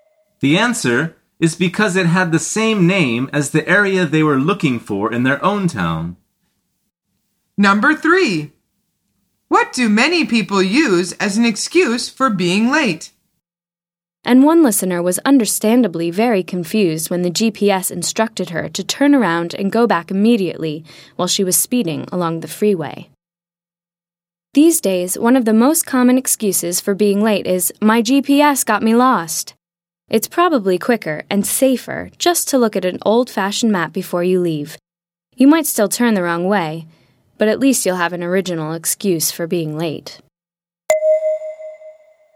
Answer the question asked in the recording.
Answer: The answer is, "My GPS got me lost."